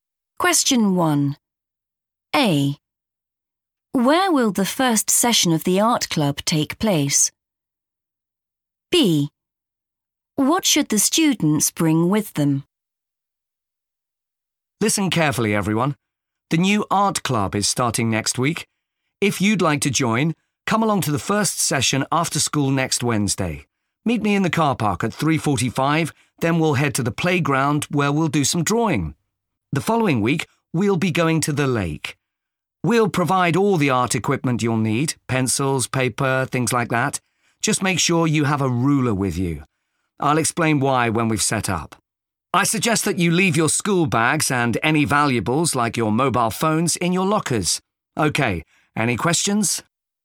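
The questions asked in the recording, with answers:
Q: Where will the first session of the art club take place?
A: the playground

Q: What should the students bring with them?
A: a ruler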